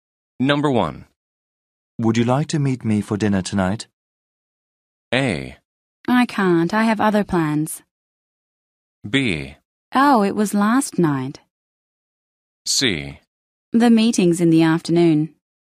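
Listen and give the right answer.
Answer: A: I can't. I have other plans.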